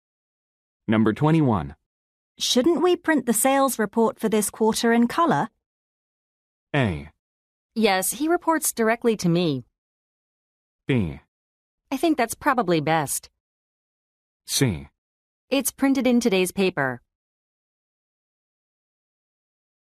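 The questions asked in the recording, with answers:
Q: Shouldn't we print the sales report for this quarter in color?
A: B: I think that's probably best.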